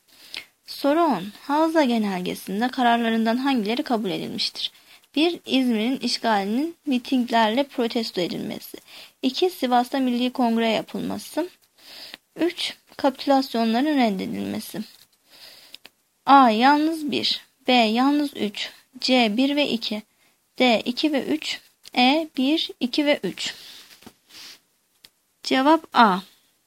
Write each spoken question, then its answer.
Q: Havza genelgesinde kararlarından hangileri kabul edilmiştir?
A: Cevap A. Yalnız 1.